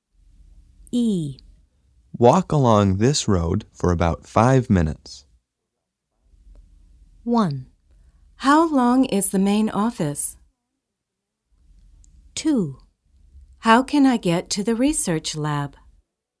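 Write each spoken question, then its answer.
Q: Walk along this road for about 5 minutes.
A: 2: How can I get to the research lab?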